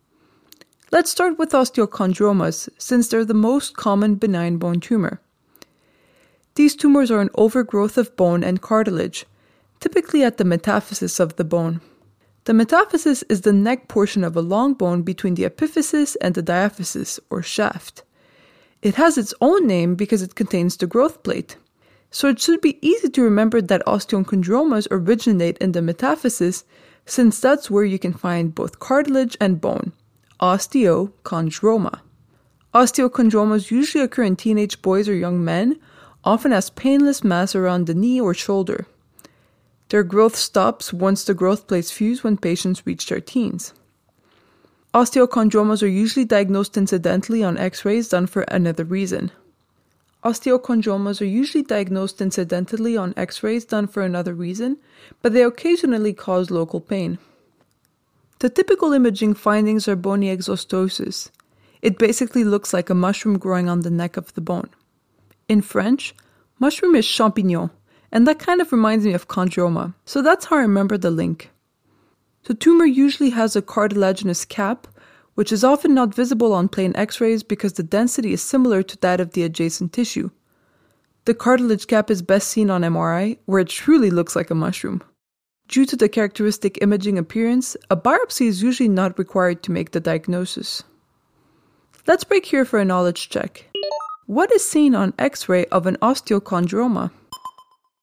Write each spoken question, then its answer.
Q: What is seen on X-ray of an osteochondroma?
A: On X-ray, bony exostosis is seen.